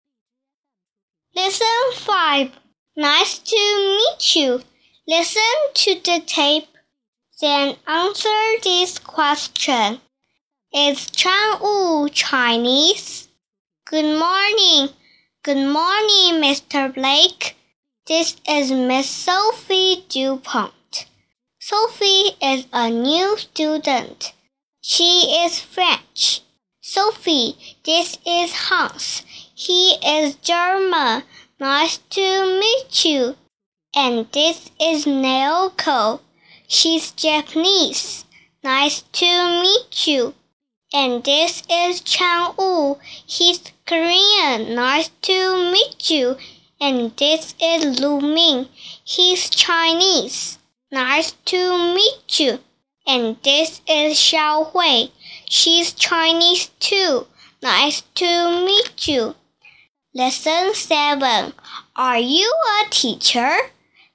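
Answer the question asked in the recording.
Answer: No, he isn't. He's Korean.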